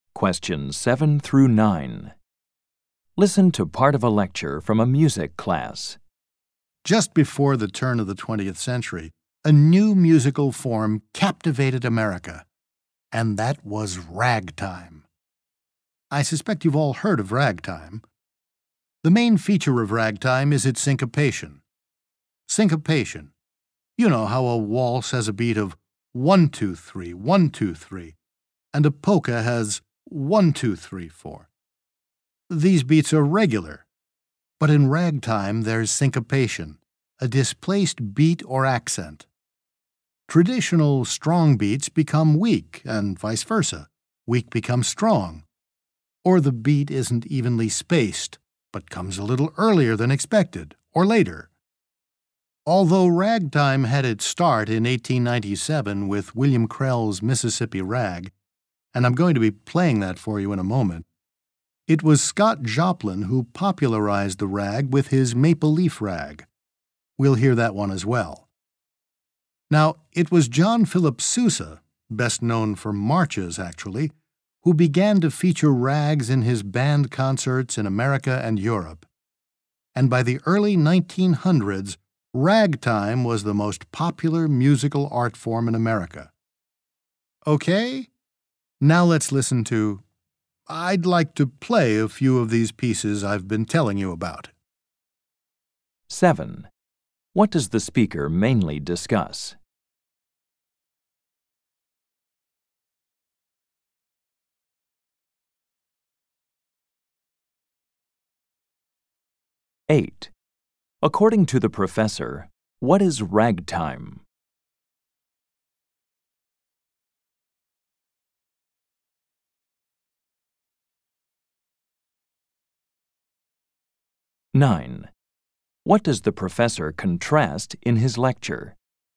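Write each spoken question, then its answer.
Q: What does the speaker mainly discuss?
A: Ragtime, a new musical form popular in America around 1900

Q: According to the professor, what is ragtime?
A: A musical form whose main feature is syncopation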